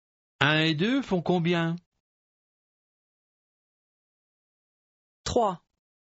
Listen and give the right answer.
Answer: Trois.